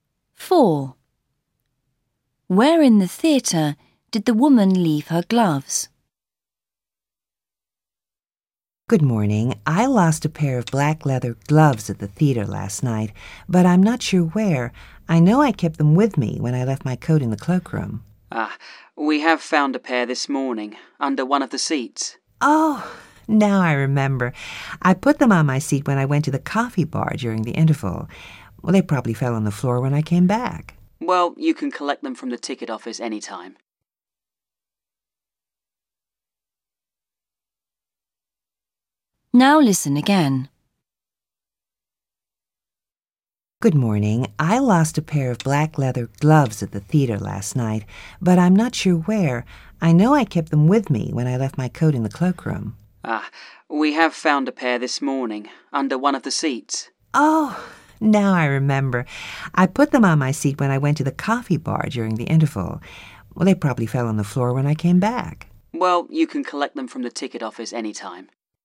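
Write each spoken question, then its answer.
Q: Where in the theatre did the woman leave her gloves?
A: On her seat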